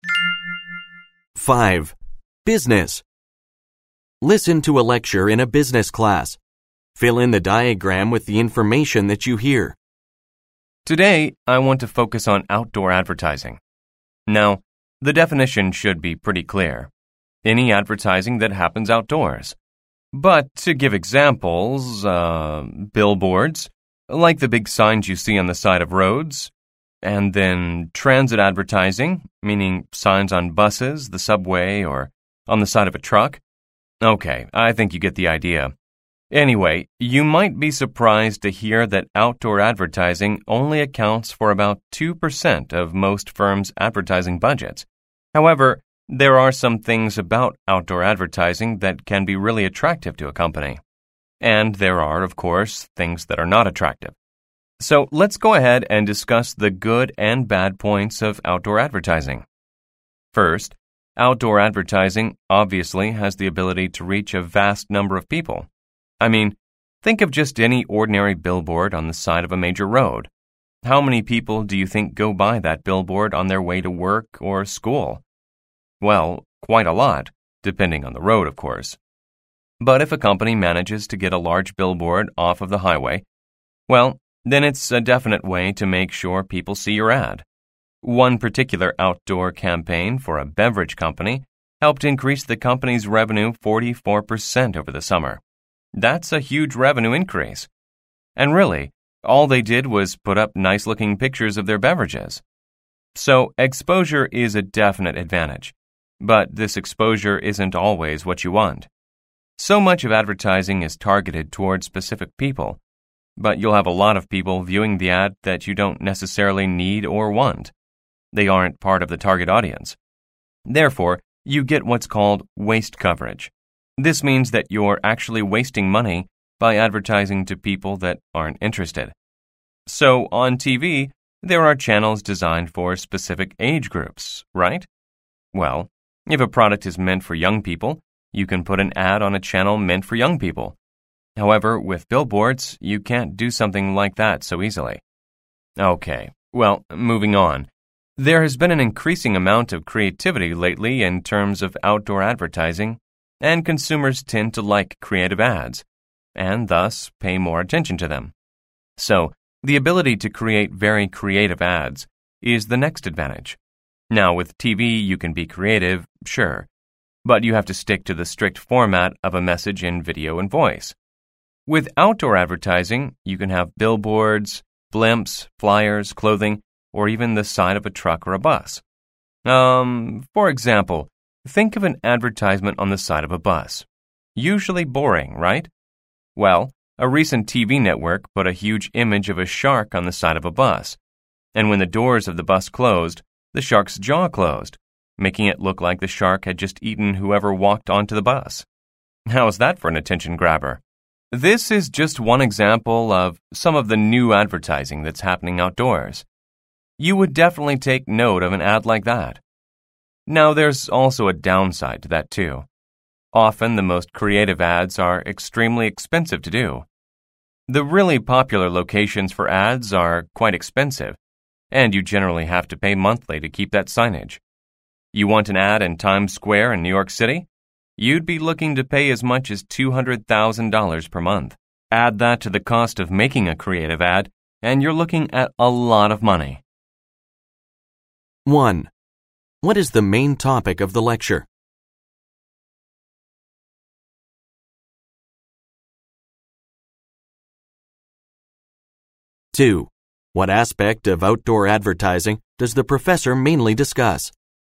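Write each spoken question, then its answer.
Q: What is the main topic of the lecture?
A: The advantages and disadvantages of outdoor advertising

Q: What aspect of outdoor advertising does the professor mainly discuss?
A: Its good and bad points (advantages and disadvantages)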